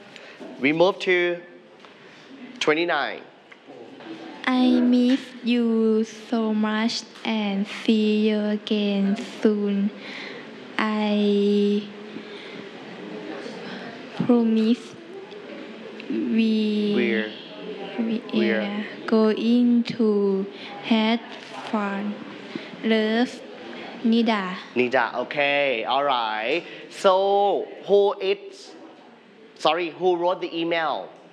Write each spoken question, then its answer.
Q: Who wrote the email?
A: Nida. Nida.